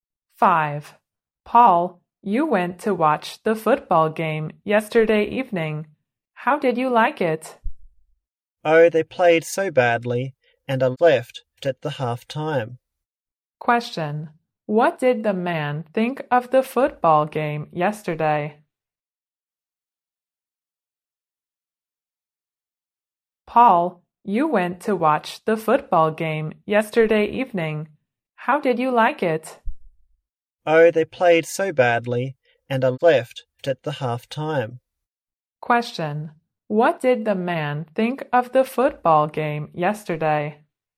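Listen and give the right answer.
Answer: It was bad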